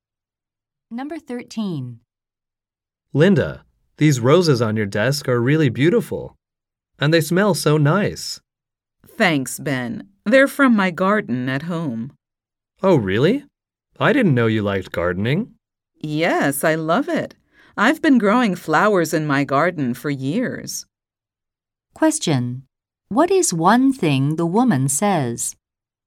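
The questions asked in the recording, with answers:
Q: What is one thing the woman says?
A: She has been growing flowers in her garden for years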